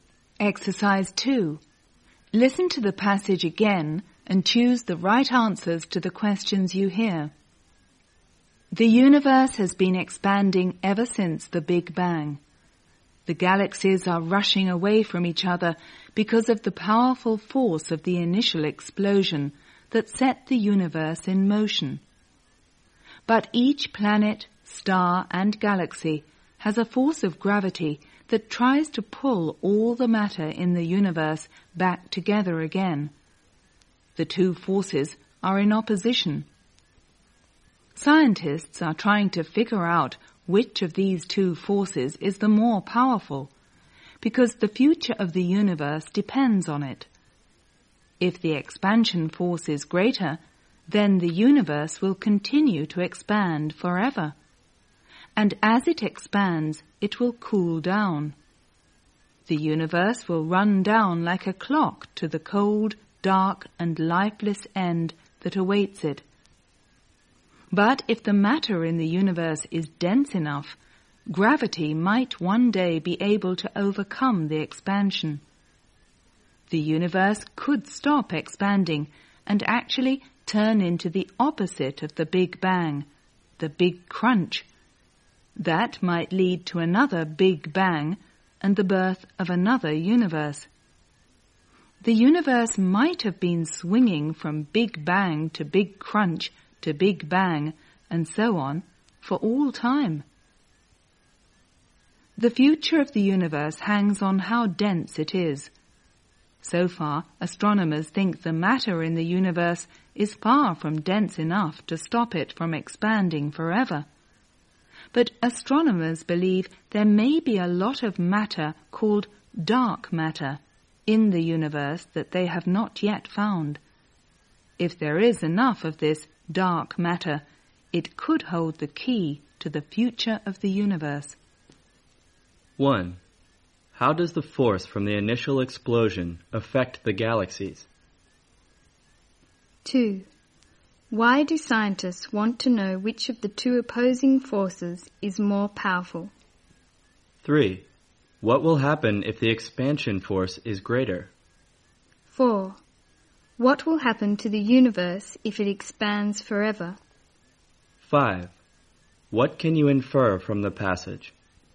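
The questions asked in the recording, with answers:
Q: How does the force from the initial explosion affect the galaxies?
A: It makes them rush away from each other

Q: Why do scientists want to know which of the two opposing forces is more powerful?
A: Because the future of the universe depends on it

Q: What will happen if the expansion force is greater?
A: The universe will continue to expand forever

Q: What will happen to the universe if it expands forever?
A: It will cool down to a cold, dark, lifeless end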